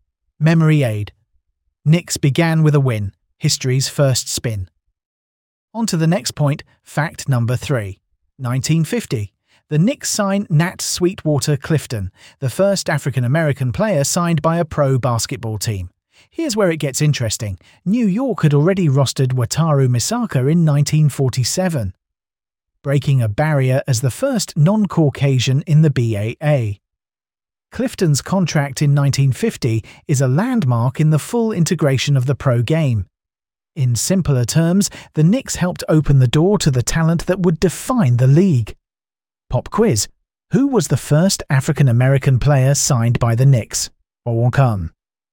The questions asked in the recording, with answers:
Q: Who was the first African-American player signed by the Knicks?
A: Correct answer. Nat Sweetwater Clifton.